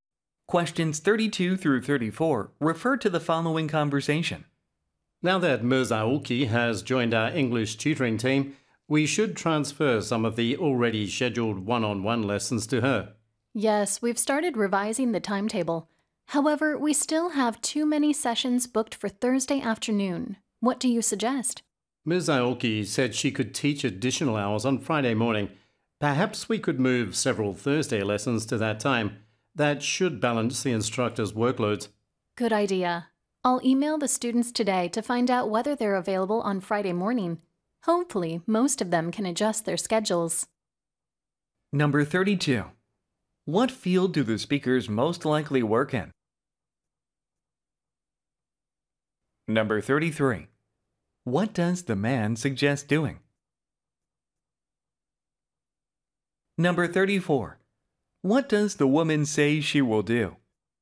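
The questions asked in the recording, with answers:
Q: What field do the speakers most likely work in?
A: English tutoring (education)

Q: What does the man suggest doing?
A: Moving several Thursday lessons to Friday morning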